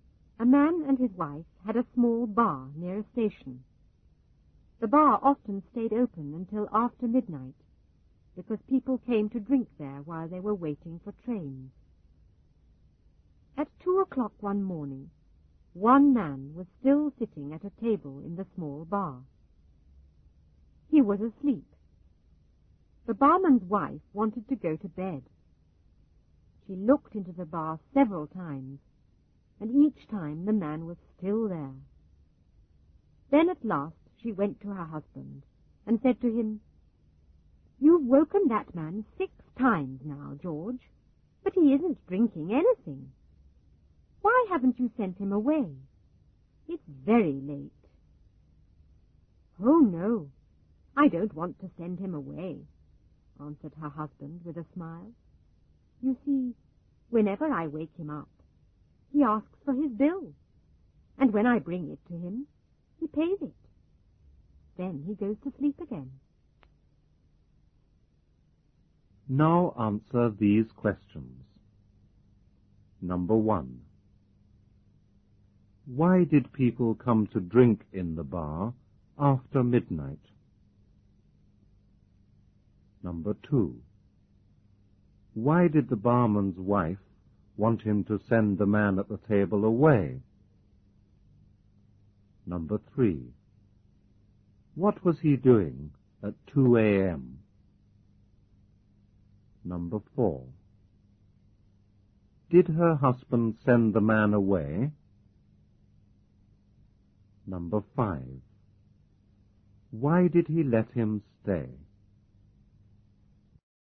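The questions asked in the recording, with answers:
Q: Why did people come to drink in the bar after midnight?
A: Because they were waiting for trains.

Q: Why did the barman's wife want him to send the man at the table away?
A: Because it was very late and she wanted to go to bed.

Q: What was he doing at 2 a.m.?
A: He was sitting at a table in the bar, asleep.

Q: Did her husband send the man away?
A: No.

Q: Why did he let him stay?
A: Because every time he woke him, the man asked for his bill and paid it.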